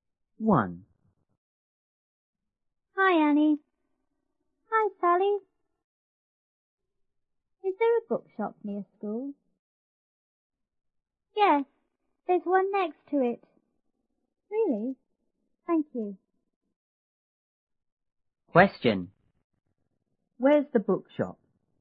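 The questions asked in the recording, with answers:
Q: Where's the bookshop?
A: Next to the school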